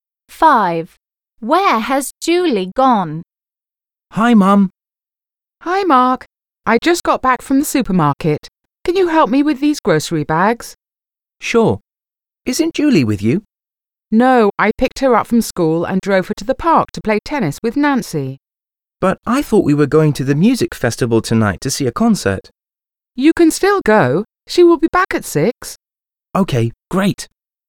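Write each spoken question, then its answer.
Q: Where has Julie gone?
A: To the park to play tennis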